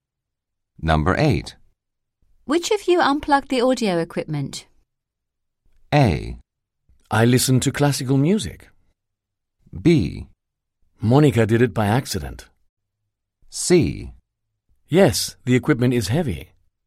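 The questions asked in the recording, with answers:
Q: Which of you unplugged the audio equipment?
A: B: Monica did it by accident.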